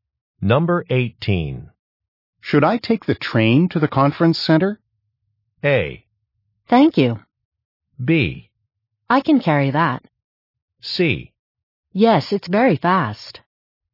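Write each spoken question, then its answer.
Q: Should I take the train to the conference center?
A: C: Yes, it's very fast.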